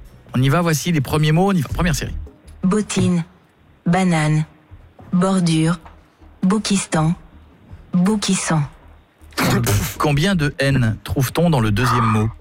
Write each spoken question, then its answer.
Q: Combien de N trouve-t-on dans le deuxième mot?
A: Deux.